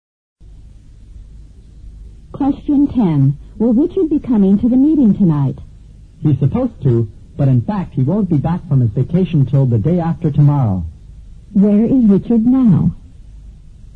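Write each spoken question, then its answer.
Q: Where is Richard now?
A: On vacation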